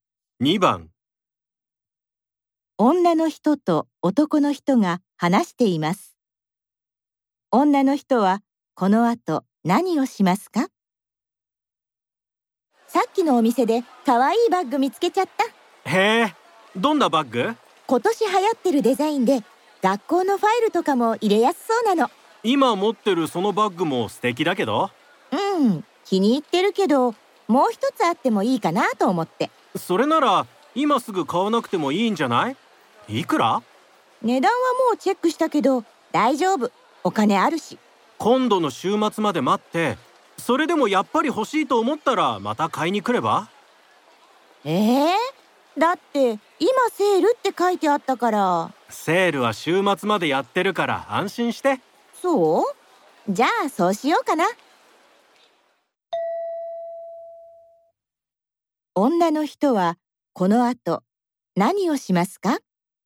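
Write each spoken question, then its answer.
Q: 女の人はこの後何をしますか?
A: 今はバッグを買わずに、週末まで待つ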